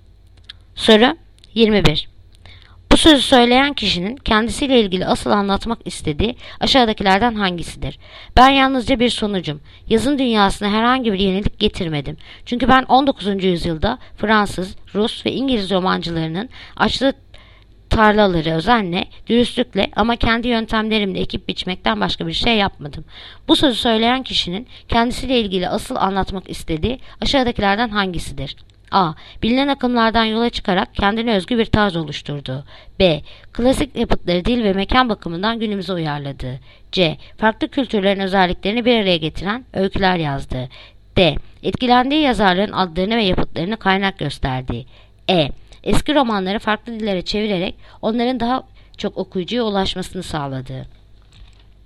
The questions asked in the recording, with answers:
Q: Bu sözü söyleyen kişinin kendisiyle ilgili asıl anlatmak istediği aşağıdakilerden hangisidir?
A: Adana. Bilinen akımlardan yola çıkarak kendine özgü bir tarz oluşturdu.